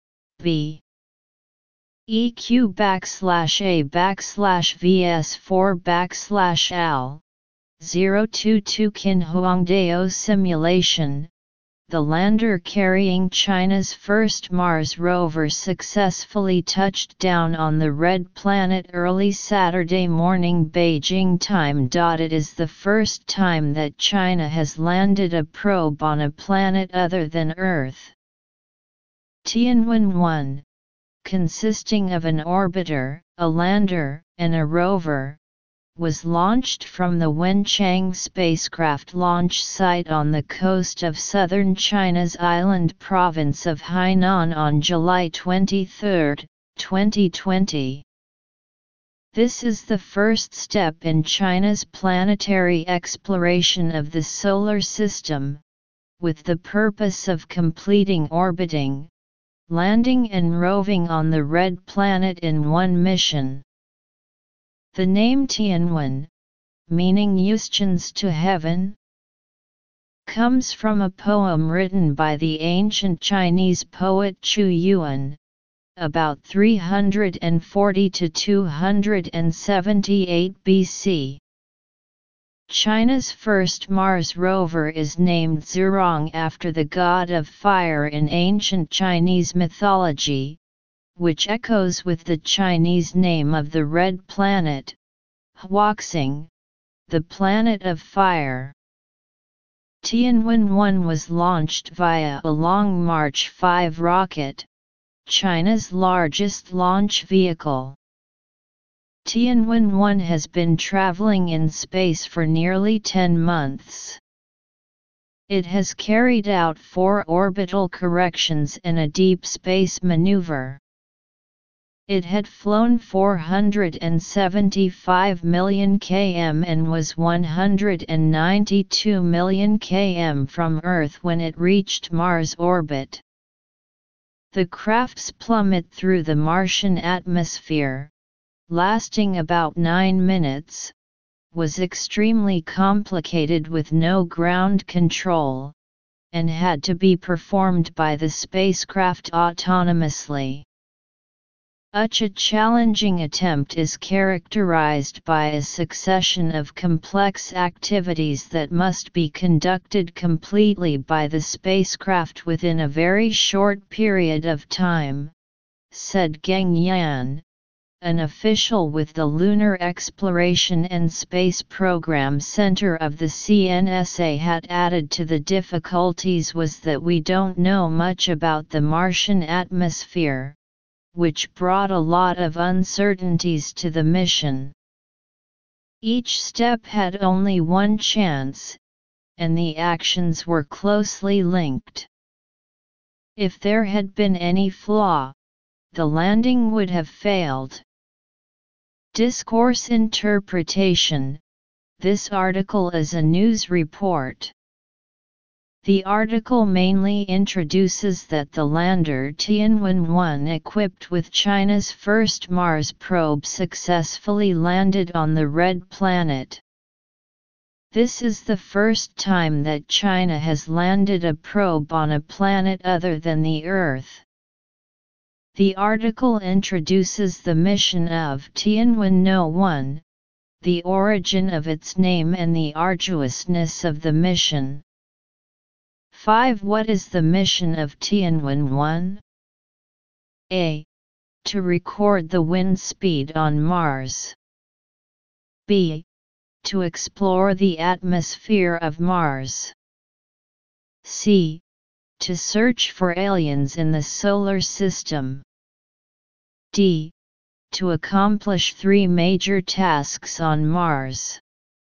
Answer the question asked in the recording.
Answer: Choose D